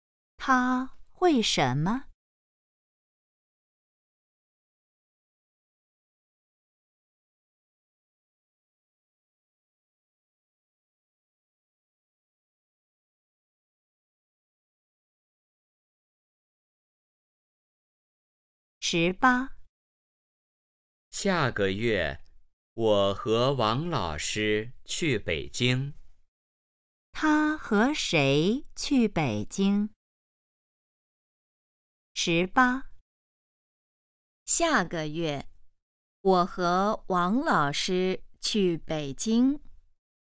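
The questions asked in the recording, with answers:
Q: 他和谁去北京?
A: 王老师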